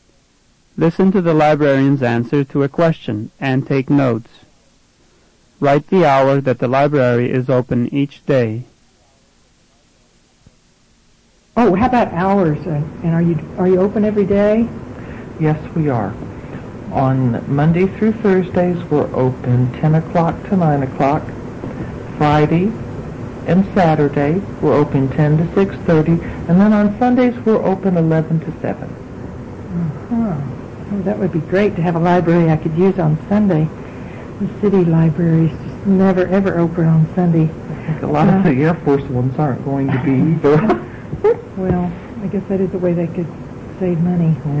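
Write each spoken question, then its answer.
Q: Write the hour that the library is open each day.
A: Monday to Thursday 10 a.m. to 9 p.m.; Friday and Saturday 10 a.m. to 6:30 p.m.; Sunday 11 a.m. to 7 p.m.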